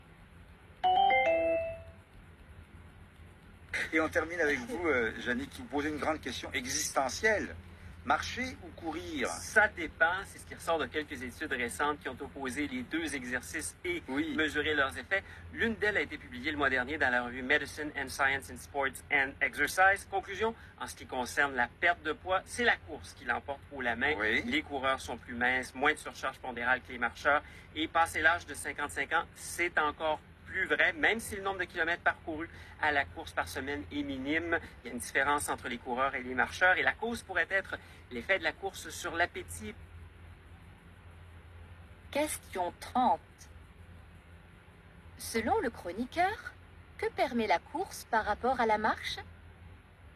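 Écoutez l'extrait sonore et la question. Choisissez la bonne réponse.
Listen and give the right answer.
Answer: Perdre plus de poids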